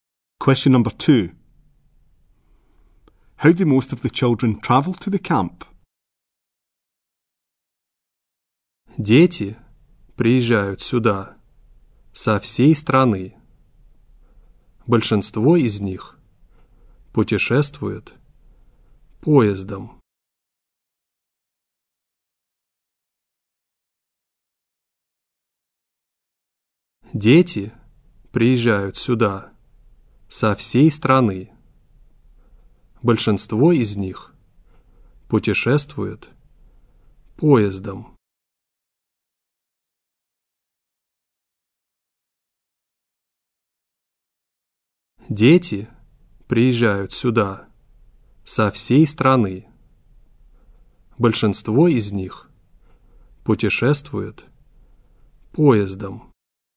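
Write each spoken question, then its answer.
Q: How do most of the children travel to the camp?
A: By train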